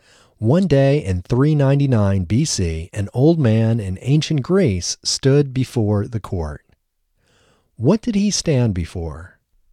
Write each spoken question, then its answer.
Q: What did he stand before?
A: He stood before the court.